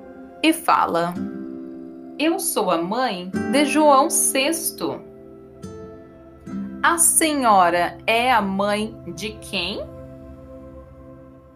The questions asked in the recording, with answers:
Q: A senhora é a mãe de quem?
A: João VI a senhora é a mãe de João VI.